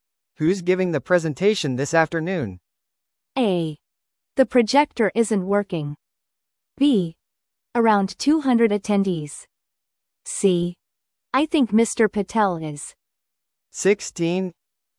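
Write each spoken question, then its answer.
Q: Who's giving the presentation this afternoon?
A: C: I think Mr. Patel is.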